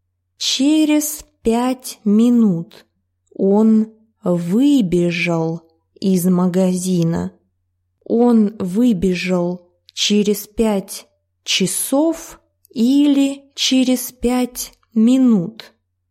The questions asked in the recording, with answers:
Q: Он выбежал через 5 часов или через 5 минут?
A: Через 5 минут он был в магазине 5 минут и потом выбежал из него.